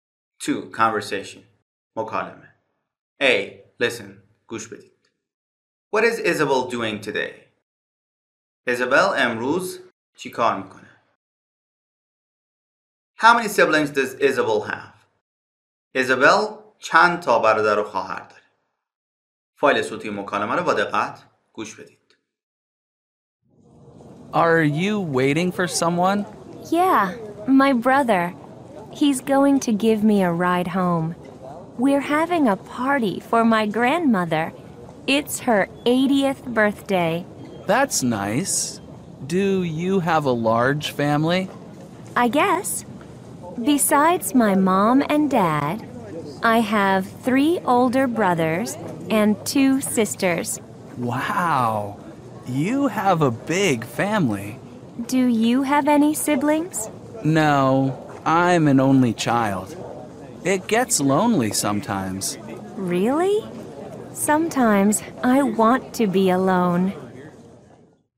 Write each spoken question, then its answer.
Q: What is Isabel doing today?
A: Isabel is going to a party for her grandmother's 80th birthday.

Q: How many siblings does Isabel have?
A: Isabel has 5 siblings.